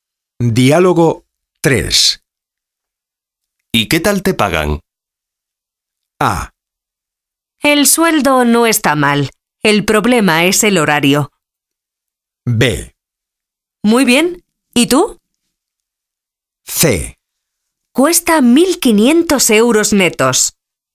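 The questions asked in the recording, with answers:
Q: ¿Y qué tal te pagan?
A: A: El sueldo no está mal. El problema es el horario.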